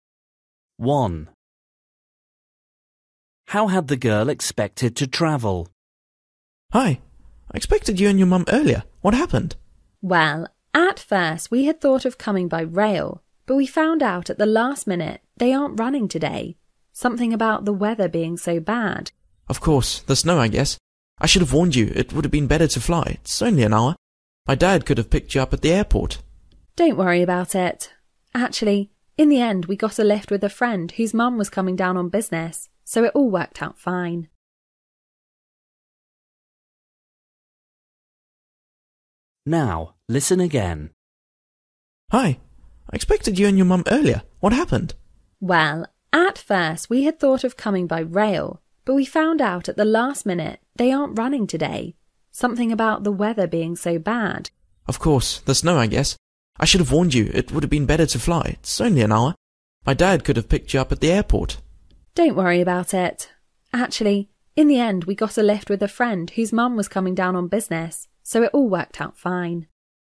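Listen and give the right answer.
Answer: by train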